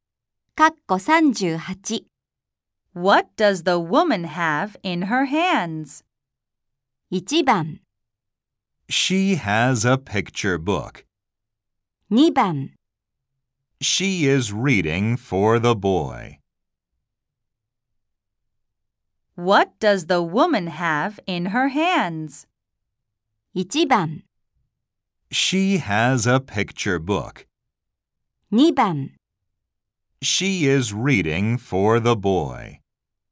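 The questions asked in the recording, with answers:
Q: What does the woman have in her hands?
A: 1: She has a picture book.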